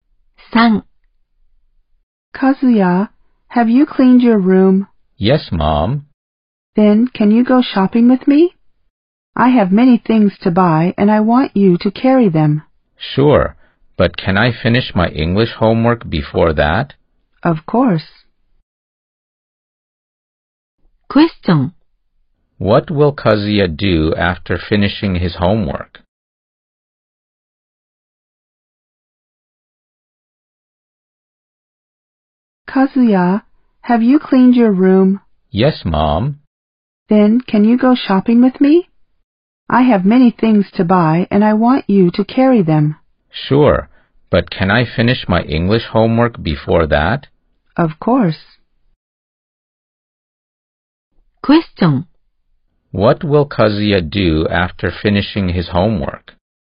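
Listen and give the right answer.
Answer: He will go shopping with his mother and carry things.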